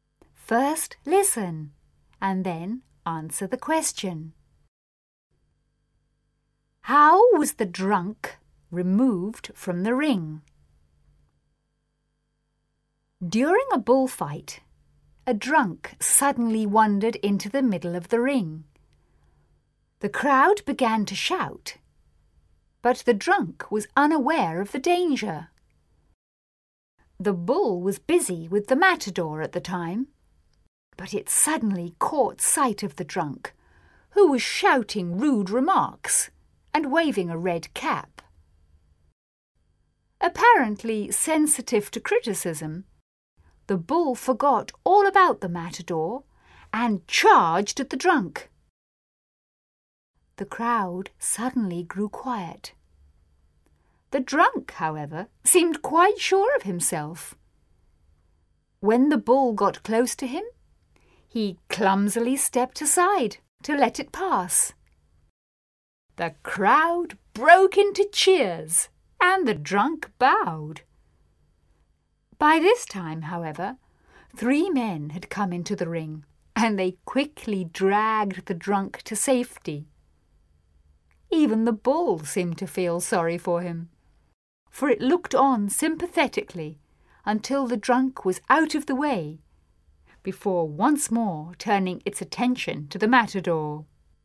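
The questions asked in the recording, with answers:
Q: How was the drunk removed from the ring?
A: Three men came into the ring and quickly dragged him to safety.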